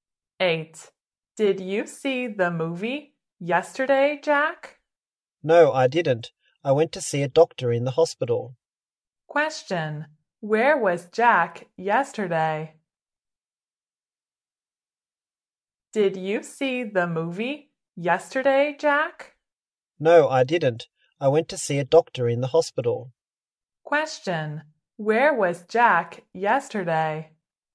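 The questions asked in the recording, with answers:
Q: where was Jack yesterday?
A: In the hospital.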